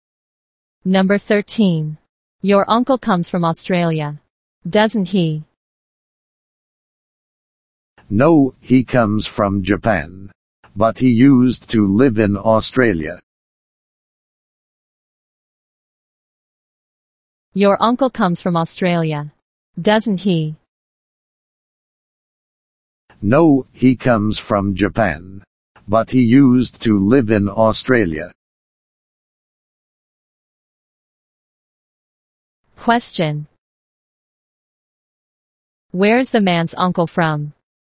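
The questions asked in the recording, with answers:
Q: Where's the man's uncle from?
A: Japan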